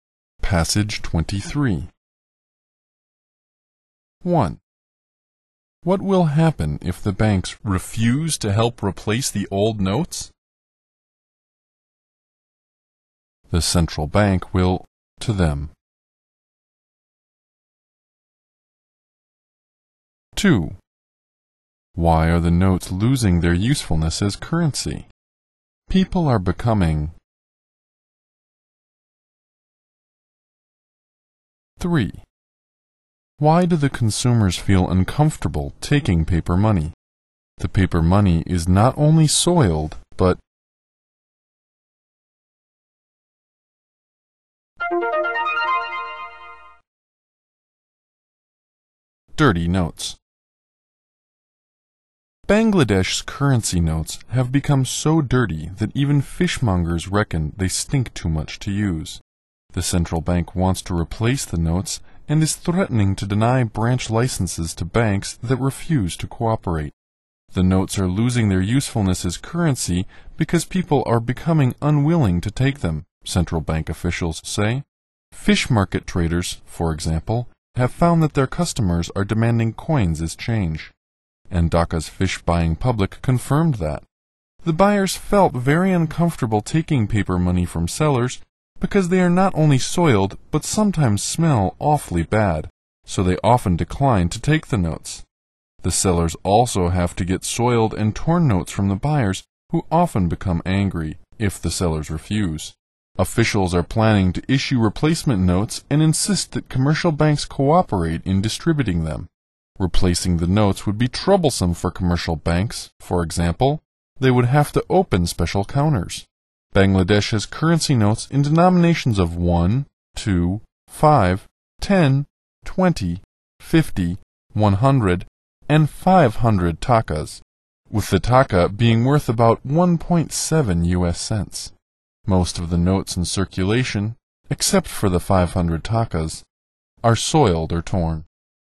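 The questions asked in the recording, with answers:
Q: What will happen if the banks refuse to help replace the old notes?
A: The central bank will deny branch licenses to them.

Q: Why are the notes losing their usefulness as currency?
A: People are becoming unwilling to take them.

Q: Why do the consumers feel uncomfortable taking paper money?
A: The paper money is not only soiled, but sometimes smells awfully bad.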